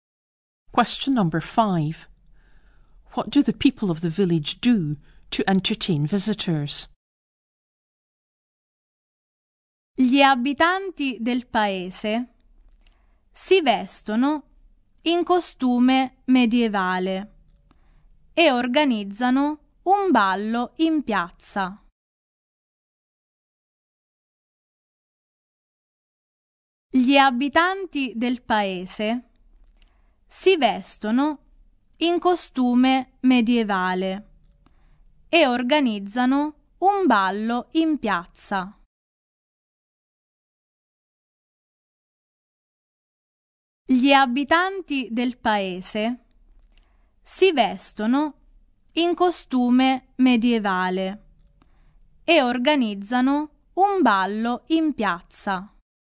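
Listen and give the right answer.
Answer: They dress in medieval costume and hold a dance in the square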